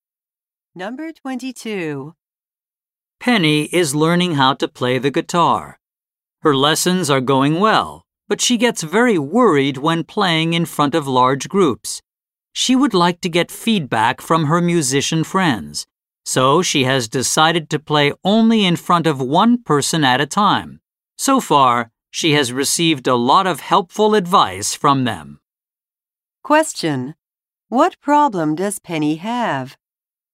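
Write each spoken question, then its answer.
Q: What problem does Penny have?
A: She gets very worried when playing in front of large groups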